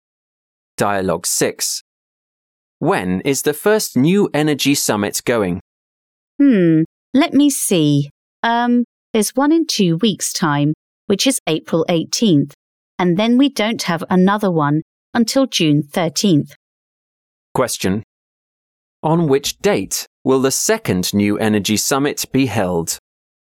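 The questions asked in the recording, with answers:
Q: On which date will the second New Energy Summit be held?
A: June 13th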